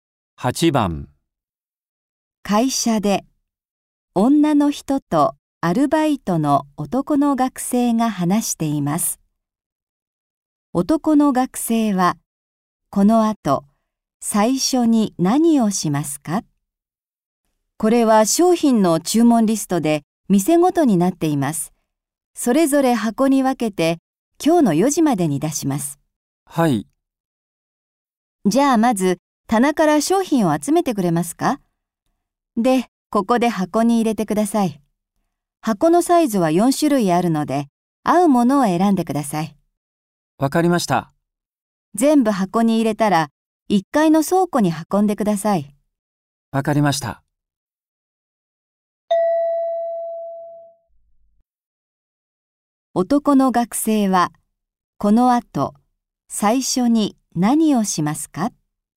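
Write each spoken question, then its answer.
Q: 男の学生は、この後、最初に何をしますか?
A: 棚から商品を集める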